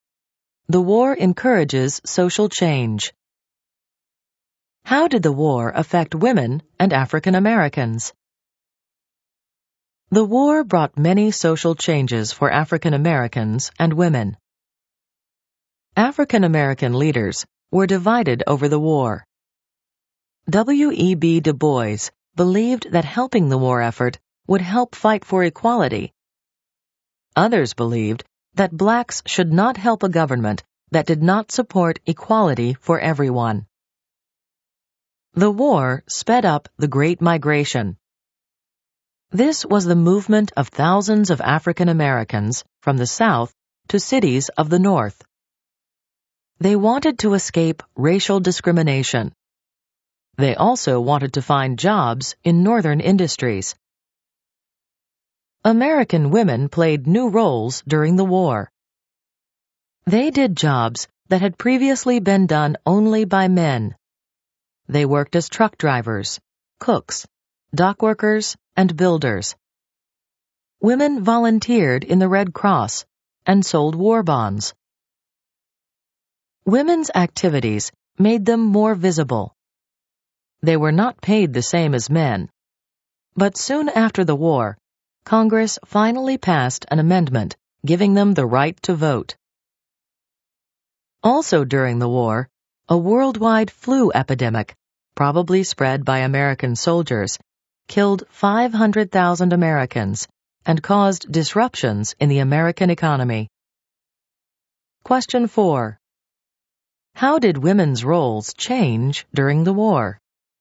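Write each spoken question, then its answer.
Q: How did women's roles change during the war?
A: They took jobs once done only by men, volunteered and sold war bonds, and soon gained the right to vote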